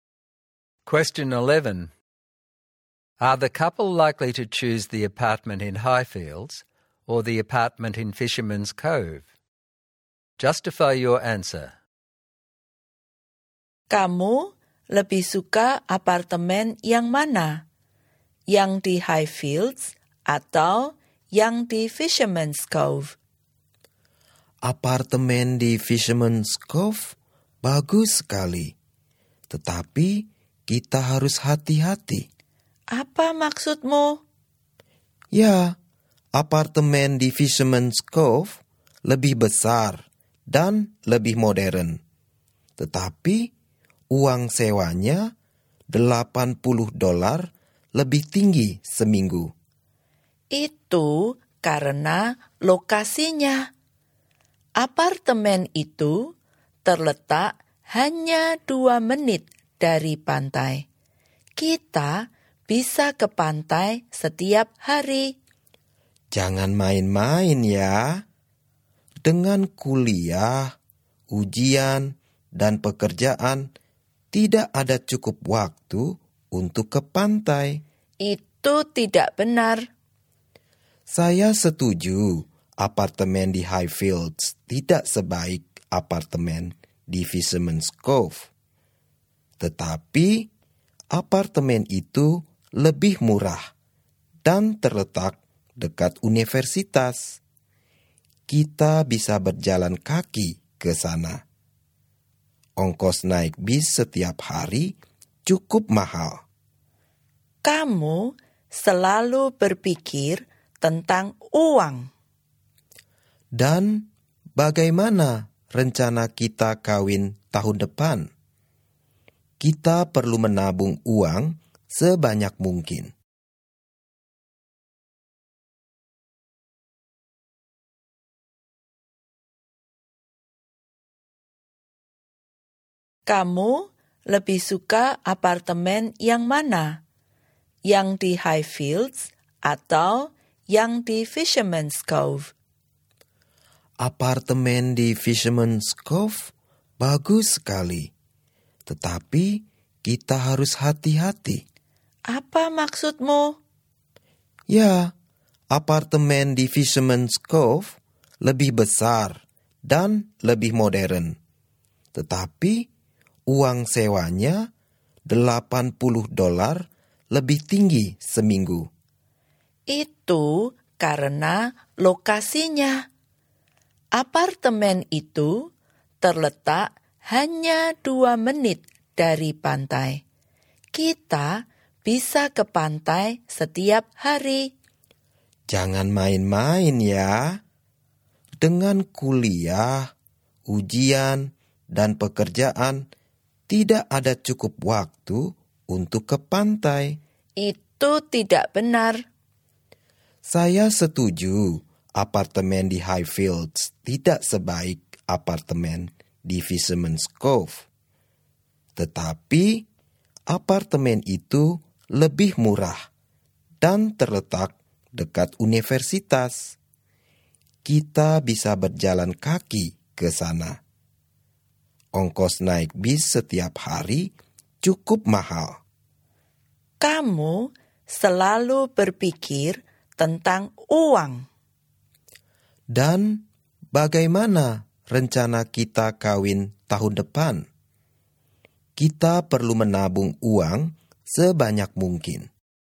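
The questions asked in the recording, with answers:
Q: Are the couple likely to choose the apartment in Highfields or the apartment in Fisherman's Cove?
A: Highfields: it is cheaper, close to the university, and they need to save money for their wedding.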